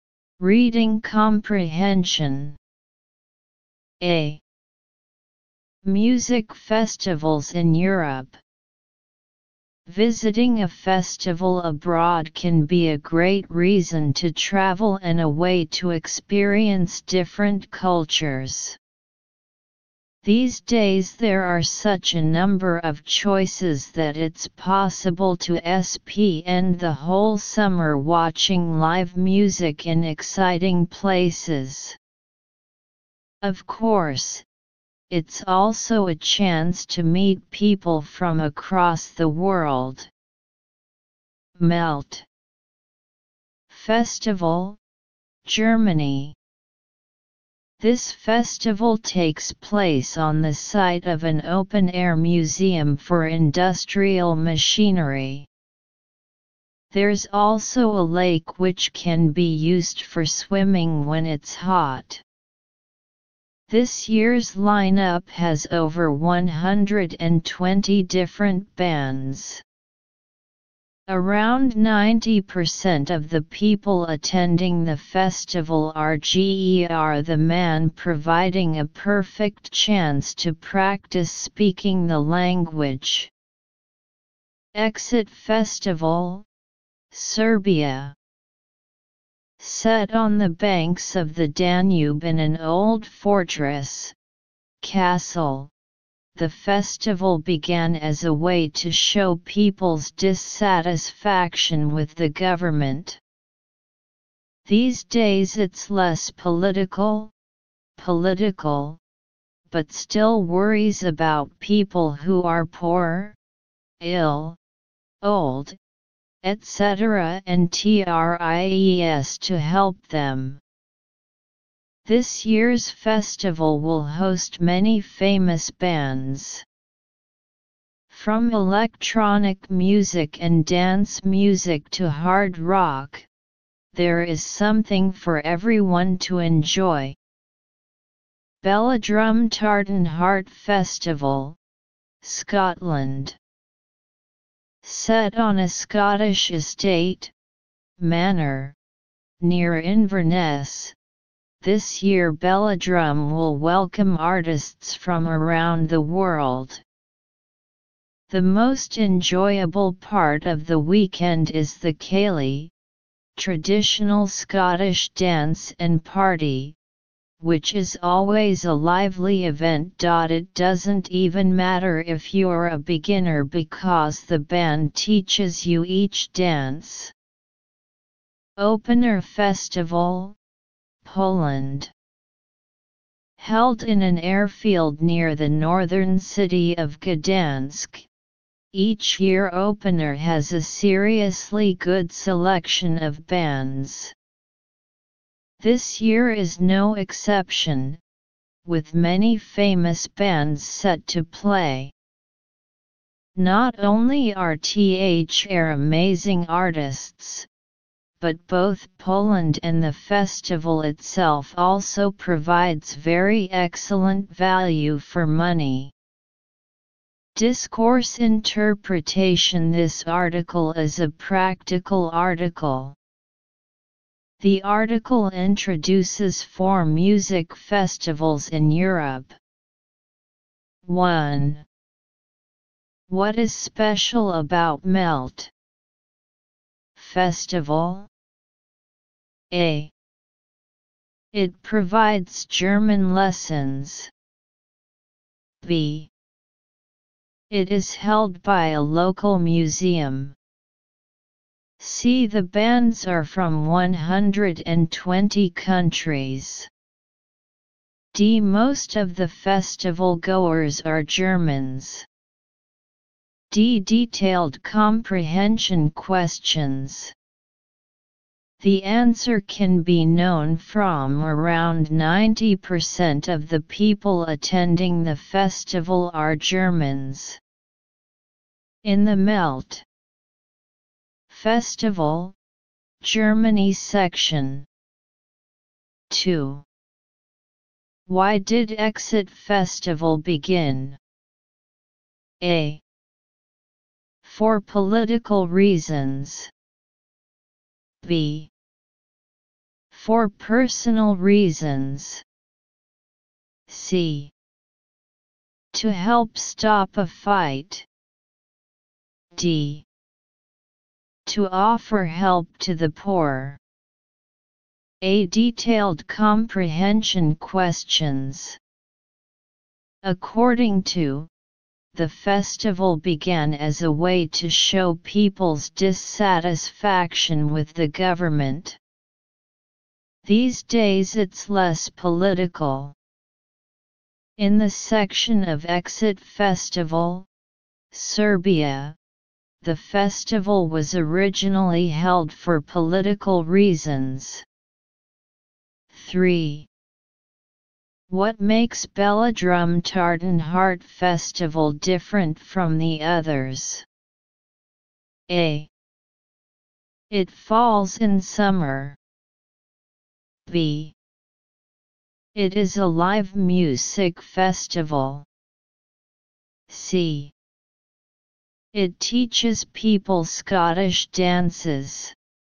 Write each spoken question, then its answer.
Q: What is special about MELT?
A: D. Detailed comprehension questions.

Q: Why did Exit Festival begin?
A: A detailed comprehension questions.